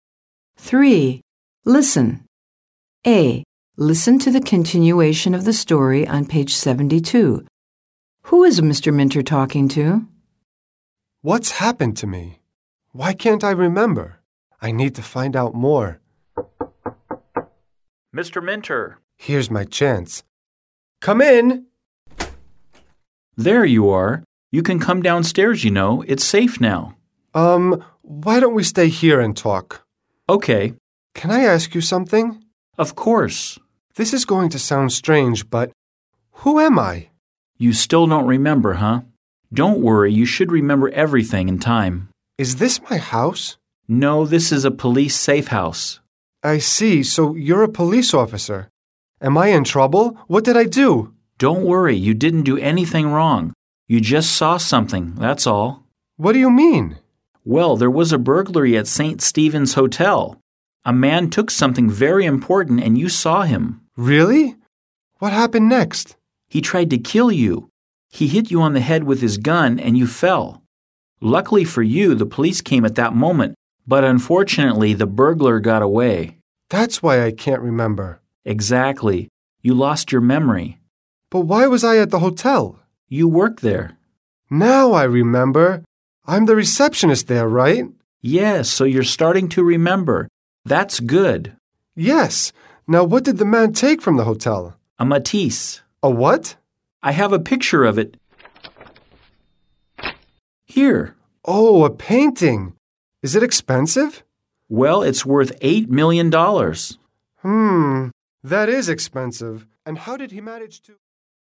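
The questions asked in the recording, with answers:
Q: Who is Mr. Minter talking to?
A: The hotel receptionist who saw the burglary and lost her memory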